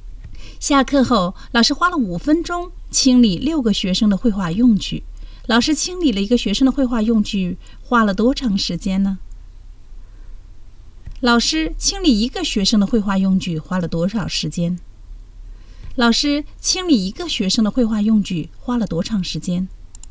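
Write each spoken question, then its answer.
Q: 老师清理了一个学生的绘画用具,花了多长时间呢?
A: 50秒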